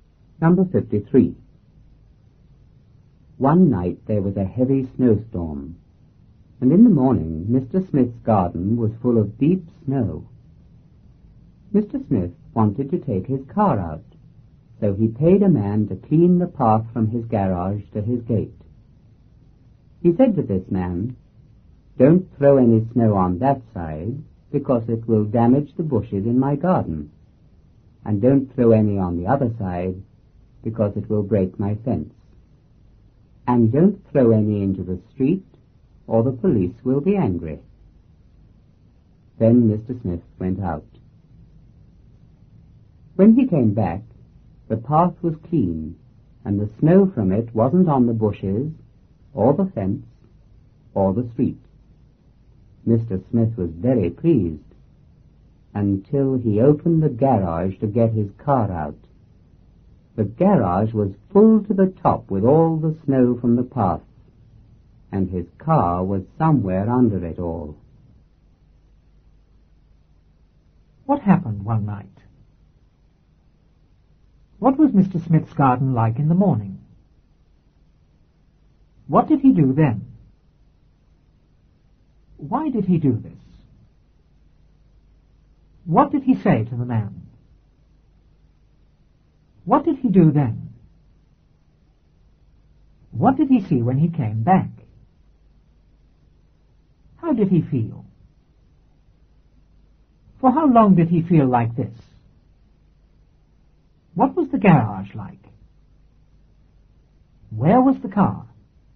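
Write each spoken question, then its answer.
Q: What happened one night?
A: There was a heavy snowstorm.

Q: What was Mr. Smith's garden like in the morning?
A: Full of deep snow.

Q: What did he do then?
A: He paid a man to clean the path from his garage to his gate.

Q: Why did he do this?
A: He wanted to take his car out.

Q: What did he say to the man?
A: Not to throw snow on the bushes, the fence or the street.

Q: What did he do then?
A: He went out.

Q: What did he see when he came back?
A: The path was clean and no snow was on the bushes, fence or street.

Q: How did he feel?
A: Very pleased.

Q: For how long did he feel like this?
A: Until he opened the garage.

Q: What was the garage like?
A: Full to the top with snow.

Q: Where was the car?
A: Under the snow in the garage.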